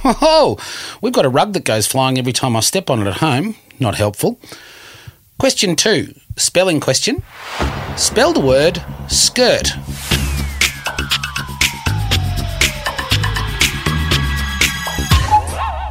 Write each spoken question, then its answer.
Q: Spell the word skirt.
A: S-K-I-R-T, skirt.